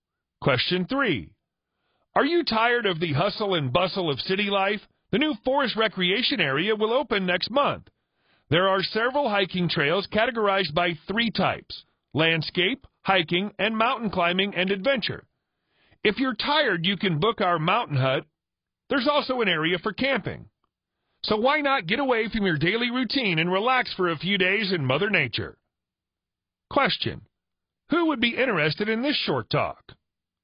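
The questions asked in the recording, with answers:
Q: Who would be interested in this short talk?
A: People tired of busy city life who want to relax in nature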